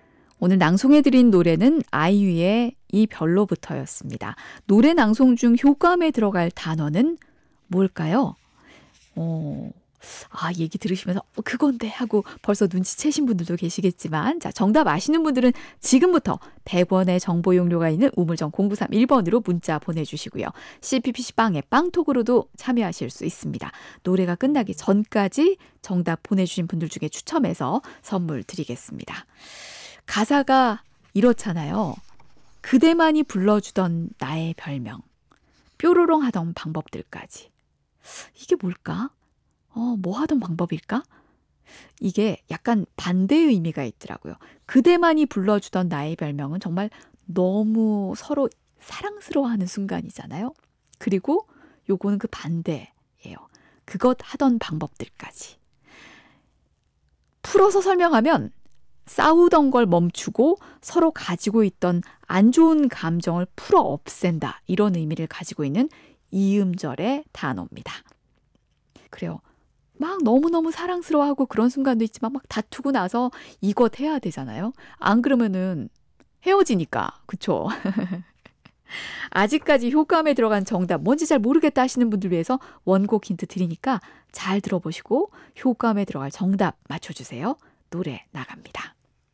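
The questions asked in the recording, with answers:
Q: 노래 낭송 중 효과음에 들어갈 단어는 뭘까요?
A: 화해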